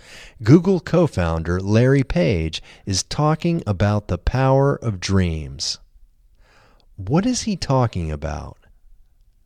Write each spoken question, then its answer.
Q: What is he talking about?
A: He is talking about the power of dreams.